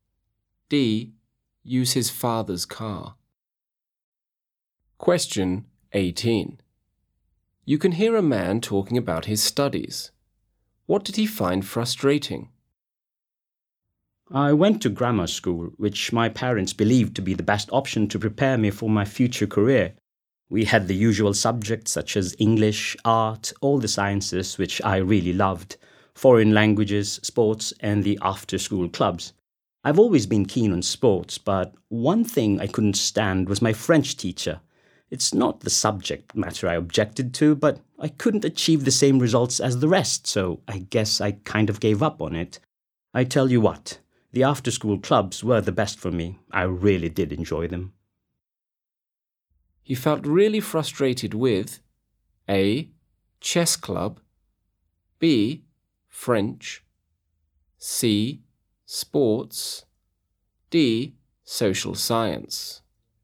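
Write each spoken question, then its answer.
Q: What did he find frustrating?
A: B: French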